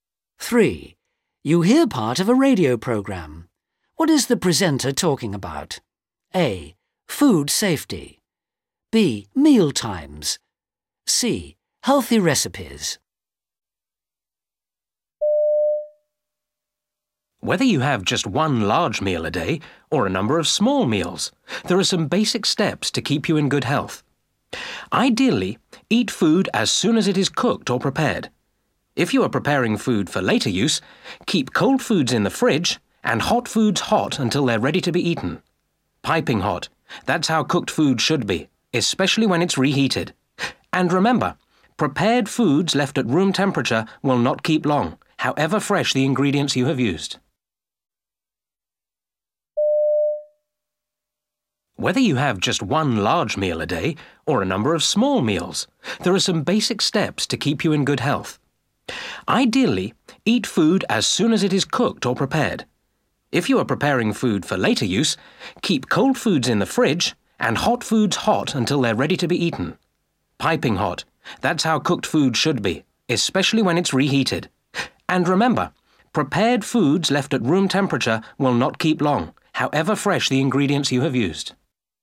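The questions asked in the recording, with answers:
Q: What is the presenter talking about? A. Food safety. B. Meal times. C. Healthy recipes.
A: A: Food safety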